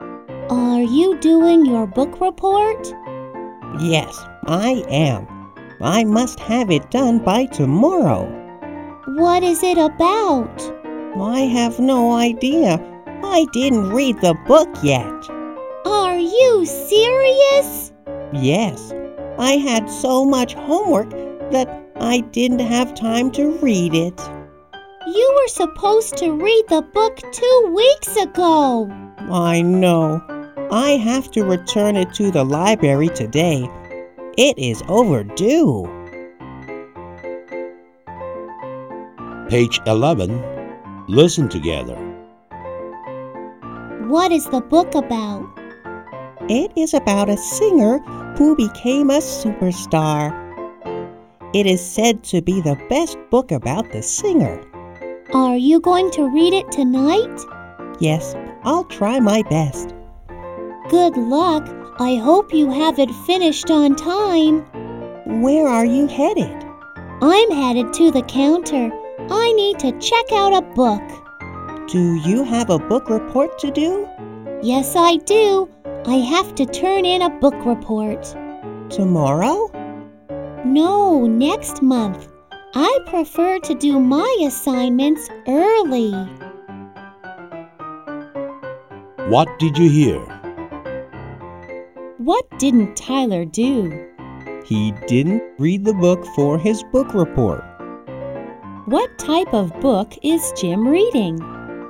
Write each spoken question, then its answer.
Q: What type of book is Jim reading?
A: He is reading a book about a singer.